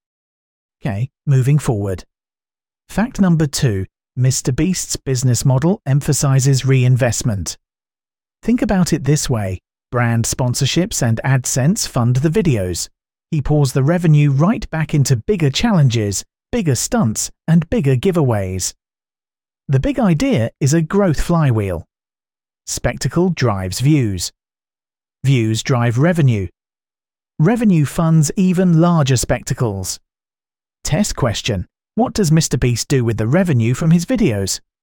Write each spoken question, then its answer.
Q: What does MrBeast do with the revenue from his videos?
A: Correct answer. He reinvests it.